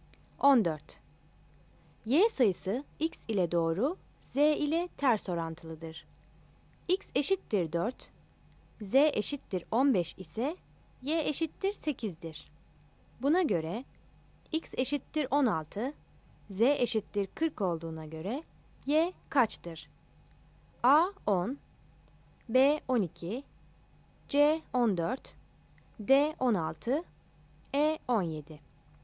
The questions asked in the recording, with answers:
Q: Buna göre X eşittir 16, Z eşittir 40 olduğuna göre Y kaçtır?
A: Yanıt B'dir.